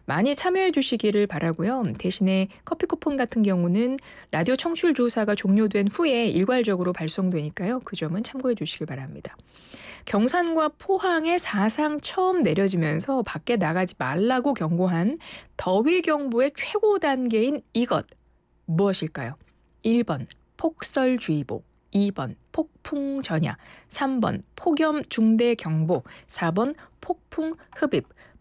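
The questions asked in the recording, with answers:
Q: 경산과 포항에 사상 처음 내려지면서 밖에 나가지 말라고 경고한 더위 경보의 최고 단계인 이것 무엇일까요?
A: 3: 폭염중대경보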